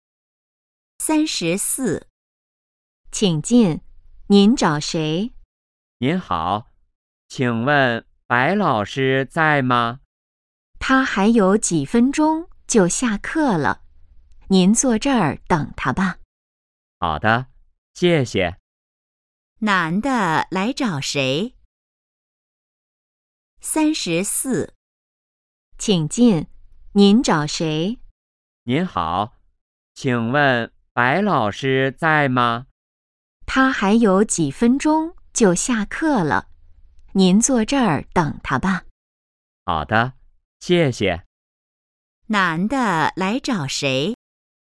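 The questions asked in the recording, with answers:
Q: 男的来找谁?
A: 白老师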